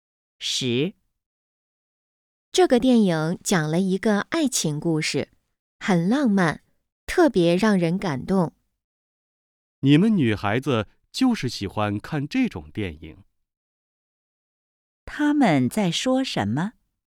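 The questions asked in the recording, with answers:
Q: 他们在说什么?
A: 一部爱情电影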